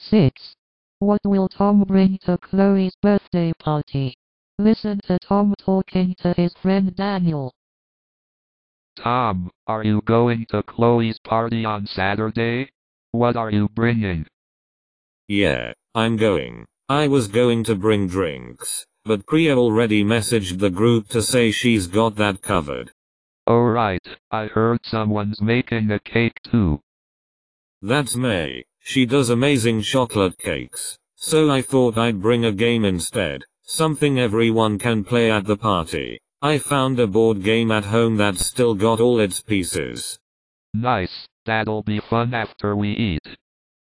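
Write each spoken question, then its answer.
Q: What will Tom bring to Chloe's birthday party?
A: A board game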